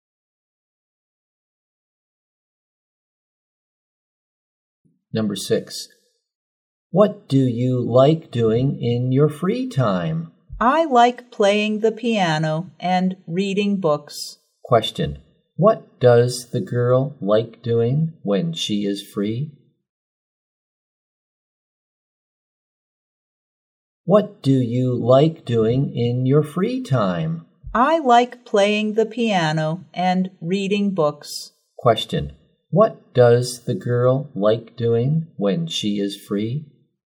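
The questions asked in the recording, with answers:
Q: Question, what does the girl like doing when she is free?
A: Playing the piano and reading books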